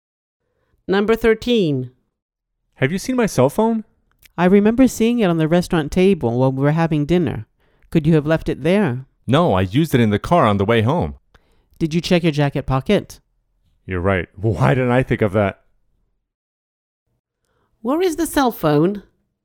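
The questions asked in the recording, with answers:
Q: Where is the cell phone?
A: In his jacket pocket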